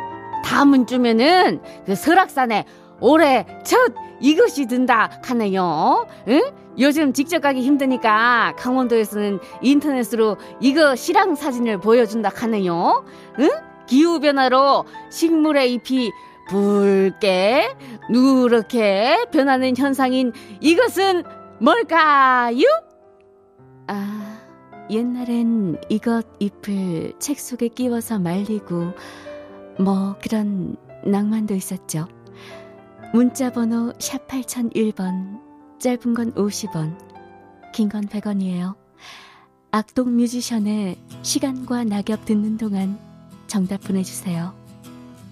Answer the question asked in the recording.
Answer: 단풍.